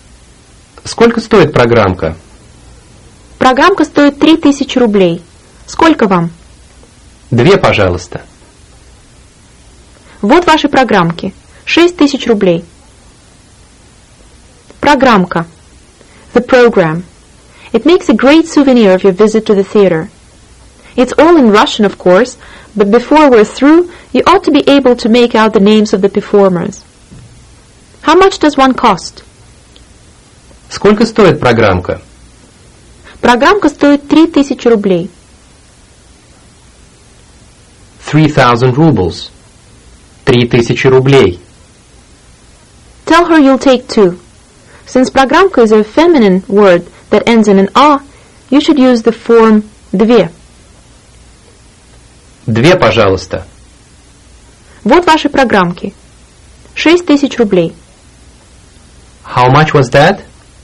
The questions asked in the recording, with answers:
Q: How much was that?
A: 6000 rubles. 6000 рублей.